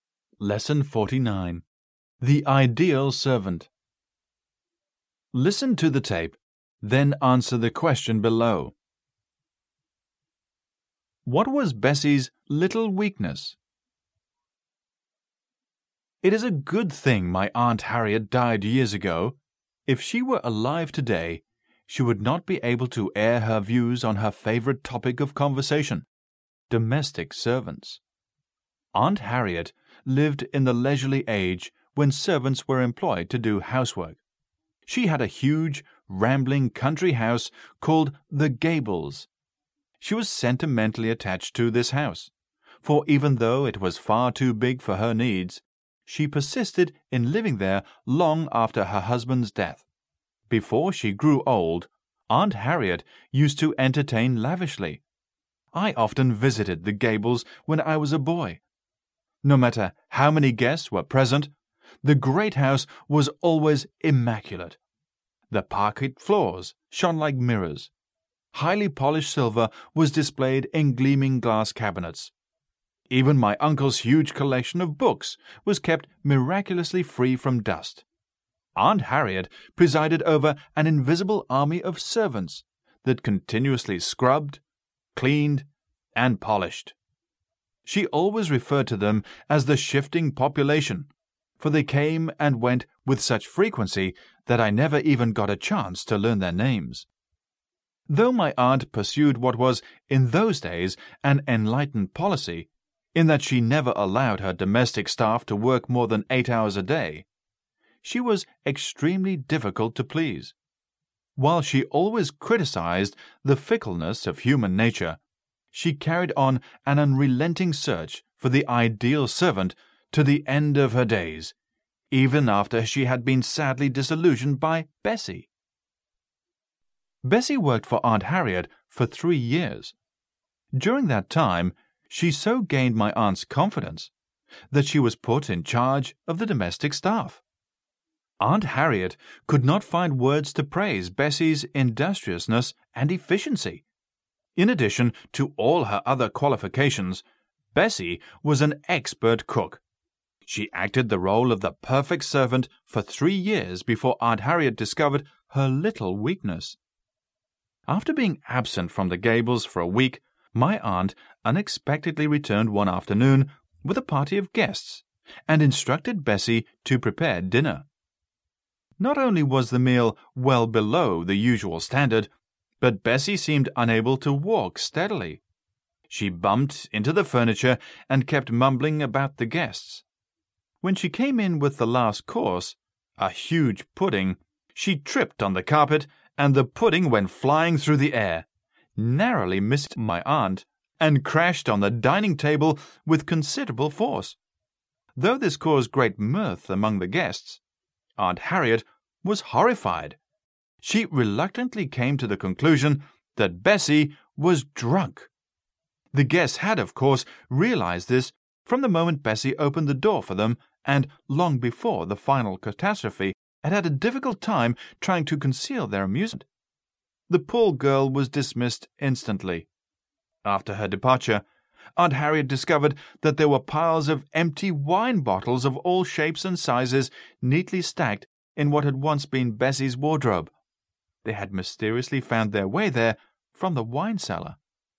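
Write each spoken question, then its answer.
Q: What was Bessie's little weakness?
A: She drank too much (she secretly drank wine from the cellar).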